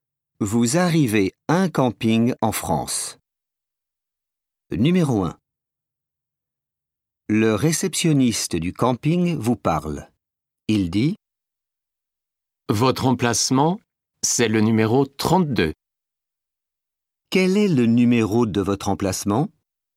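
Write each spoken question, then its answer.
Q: Quel est le numéro de votre emplacement?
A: 32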